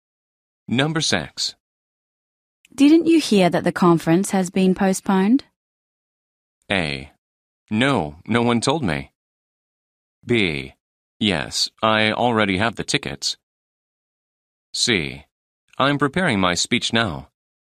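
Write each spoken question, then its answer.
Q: Didn't you hear that the conference has been postponed?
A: A: No, no one told me.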